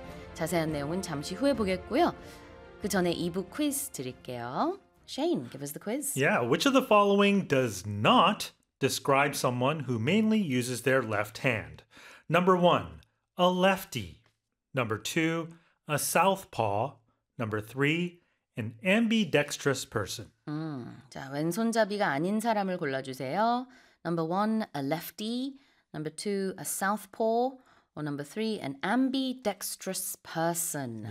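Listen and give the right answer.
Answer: 3: an ambidextrous person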